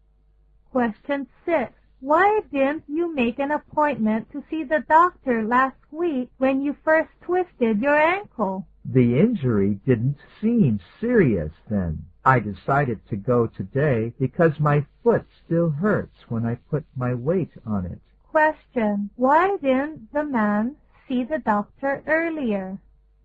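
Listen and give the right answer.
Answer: The injury didn't seem serious then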